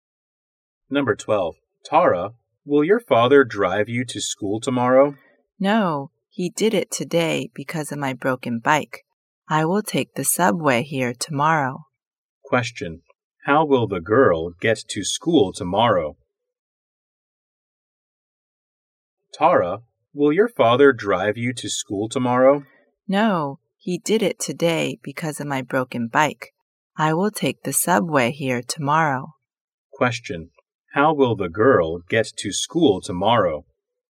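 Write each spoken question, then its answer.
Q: How will the girl get to school tomorrow?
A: By subway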